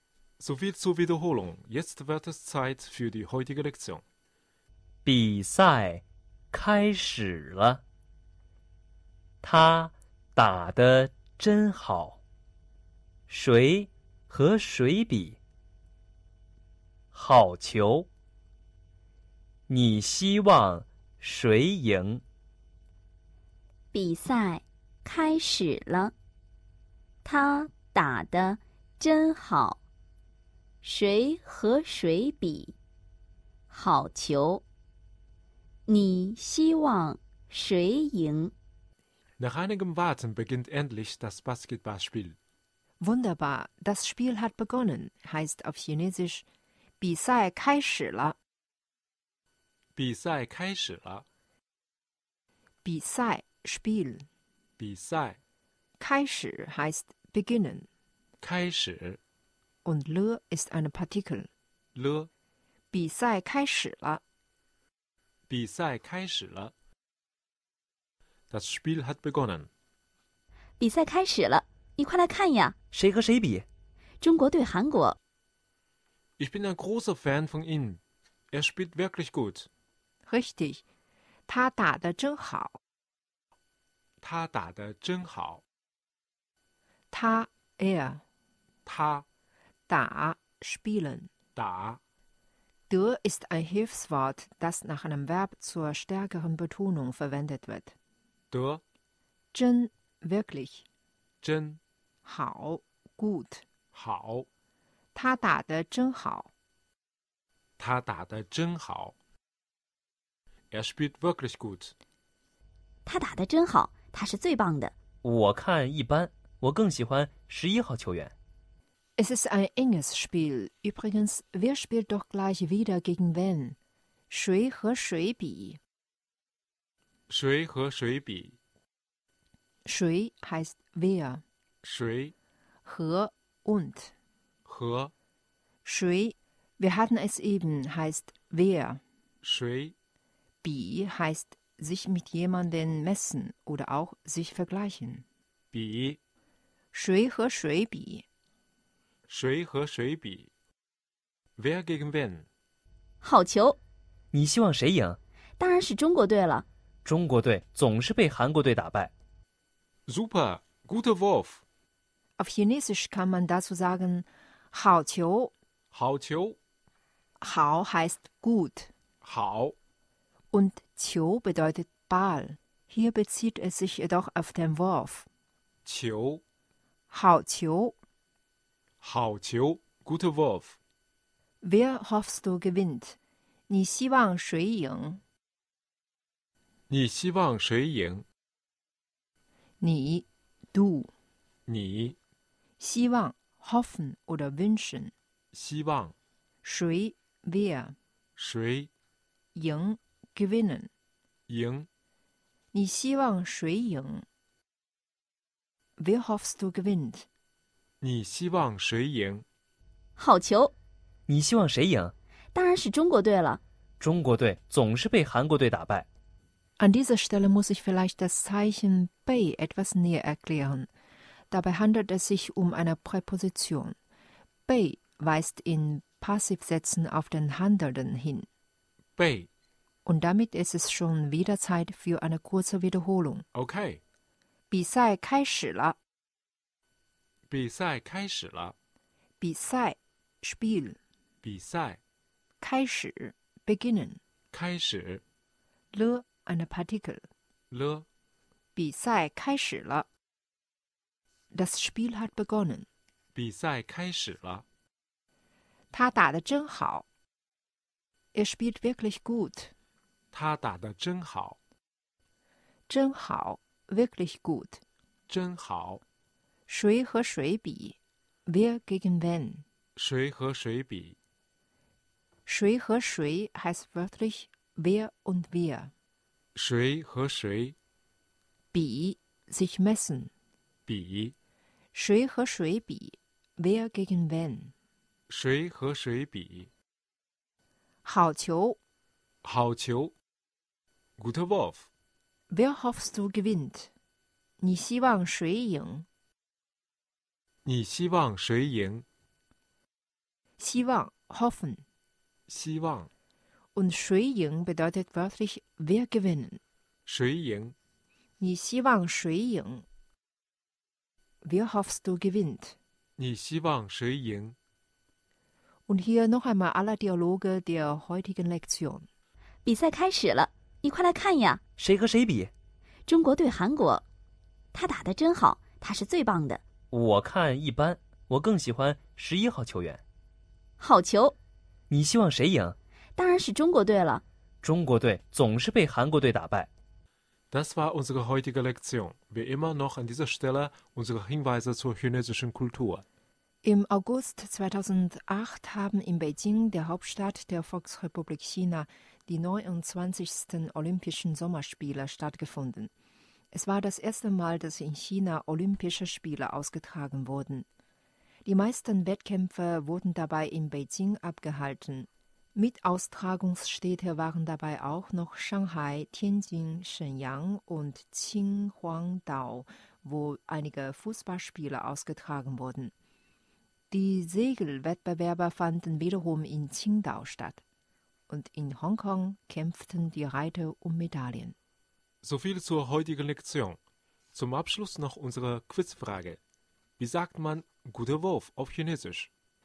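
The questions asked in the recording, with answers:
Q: Wie sagt man guter Wurf auf Chinesisch?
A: 好球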